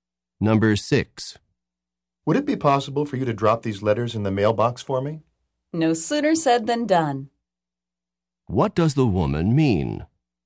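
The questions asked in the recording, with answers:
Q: What does the woman mean?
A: She will do it right away.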